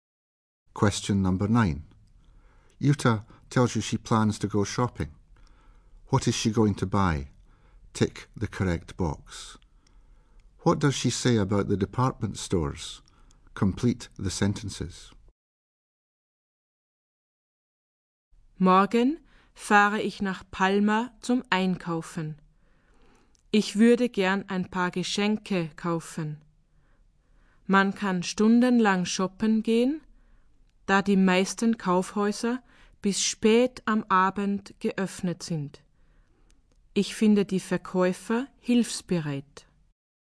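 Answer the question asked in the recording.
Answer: Most are open until late in the evening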